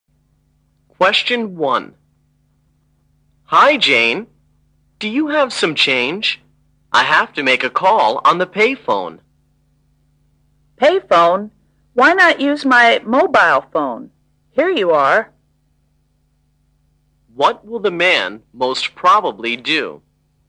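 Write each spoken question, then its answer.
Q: What will the man most probably do?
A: Make a call with the woman's mobile phone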